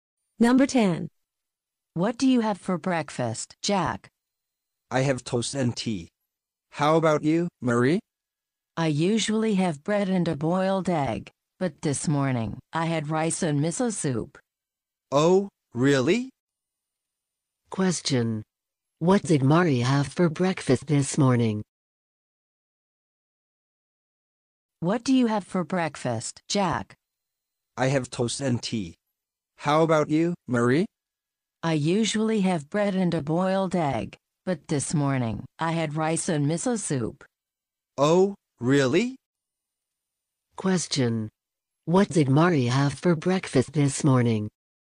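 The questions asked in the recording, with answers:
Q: What did Marie have for breakfast this morning?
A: Rice and miso soup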